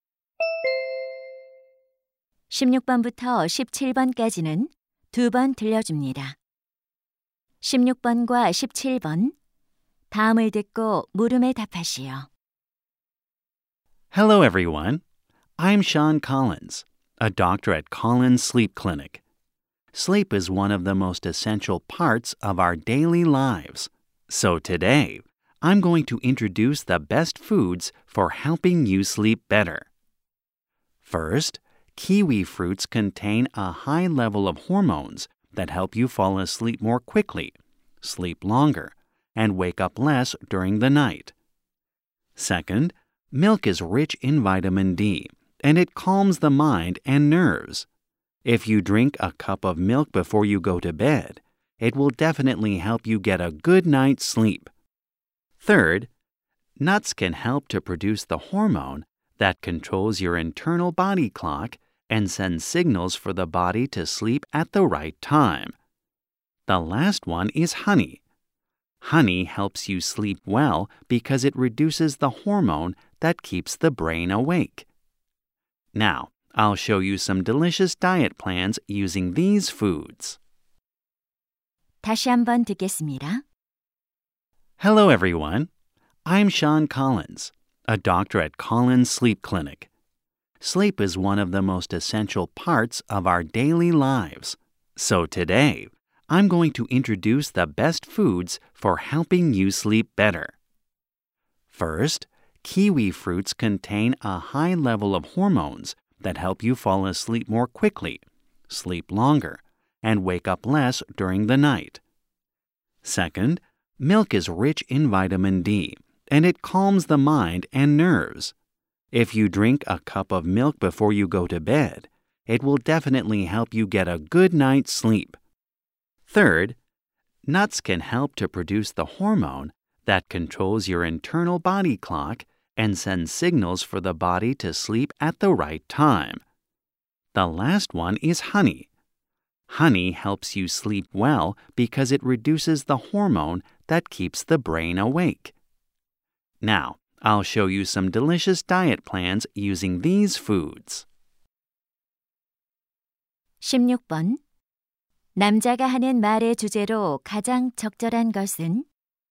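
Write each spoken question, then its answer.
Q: 남자가 하는 말의 주제로 가장 적절한 것은?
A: 숙면에 도움이 되는 음식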